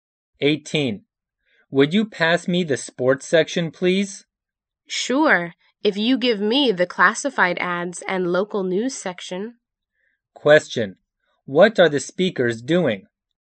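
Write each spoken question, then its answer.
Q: What are the speakers doing?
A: Reading a newspaper.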